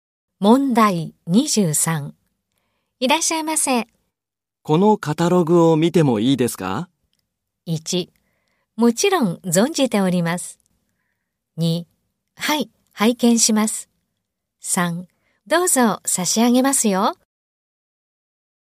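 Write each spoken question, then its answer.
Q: このカタログを見てもいいですか?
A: 1: どうぞ差し上げますよ。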